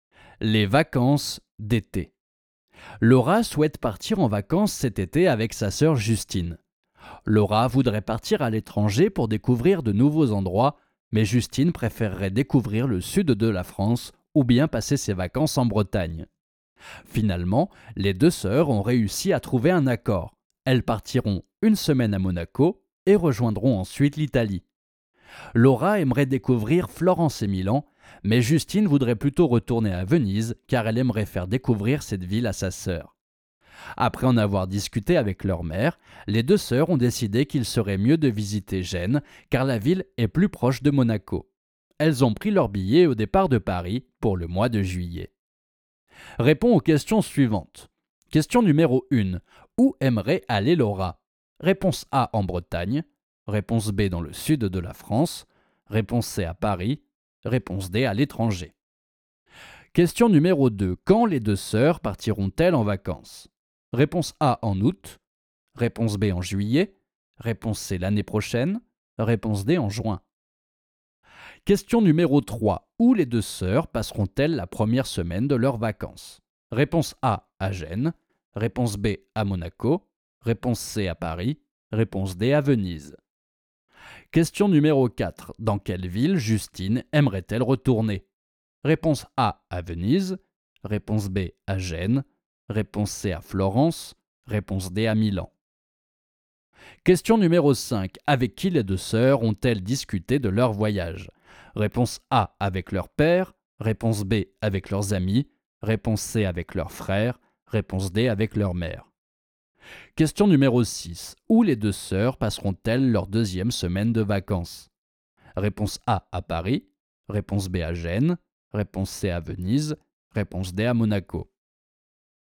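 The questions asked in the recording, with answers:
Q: Où aimerait aller Laura?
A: D: à l'étranger

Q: Quand les deux sœurs partiront-elles en vacances?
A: B: en juillet

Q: Où les deux sœurs passeront-elles la première semaine de leurs vacances?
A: B: à Monaco

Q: Dans quelle ville Justine aimerait-elle retourner?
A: A: à Venise

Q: Avec qui les deux sœurs ont-elles discuté de leur voyage?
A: D: avec leur mère

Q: Où les deux sœurs passeront-elles leur deuxième semaine de vacances?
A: B: à Gênes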